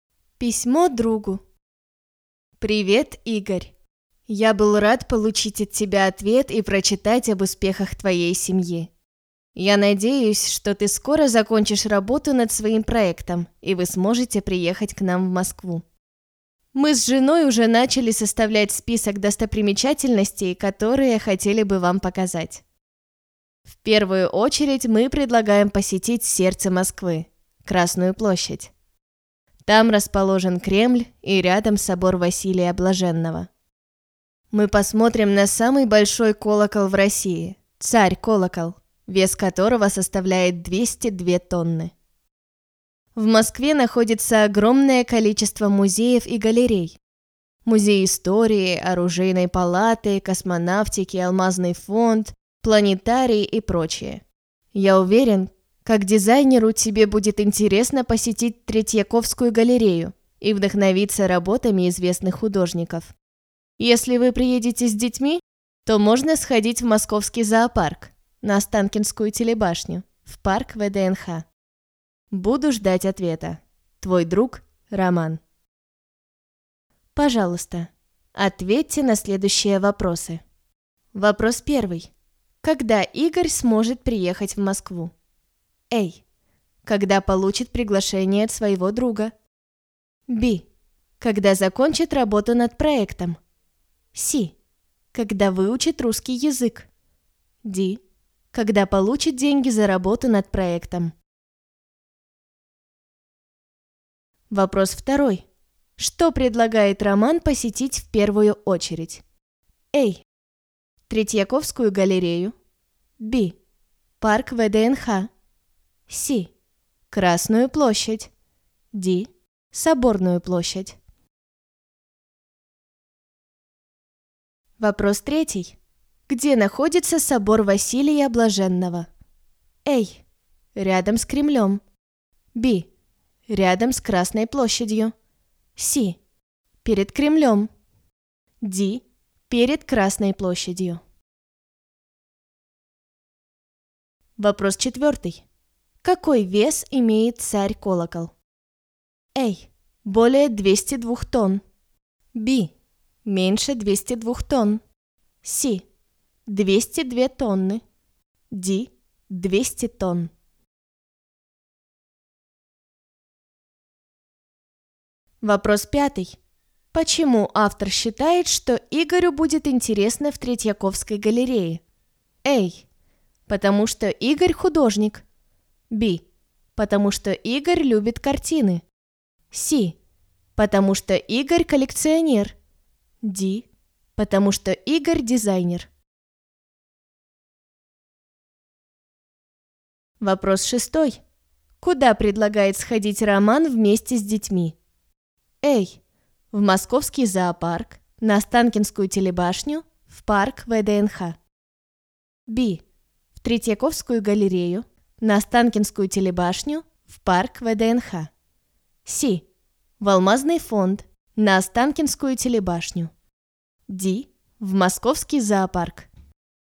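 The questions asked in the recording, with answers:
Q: Когда Игорь сможет приехать в Москву?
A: B: Когда закончит работу над проектом?

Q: Что предлагает Роман посетить в первую очередь?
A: C: Красную площадь.

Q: Где находится собор Василия Блаженного?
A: A: Рядом с Кремлем.

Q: Какой вес имеет царь-колокол?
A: C: 202 тонны.

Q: Почему автор считает, что Игорю будет интересно в Третьяковской галерее?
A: D: Потому что Игорь дизайнер.

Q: Куда предлагает сходить Роман вместе с детьми?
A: A: В московский зоопарк, на Останкинскую телебашню, в парк ВДНХ.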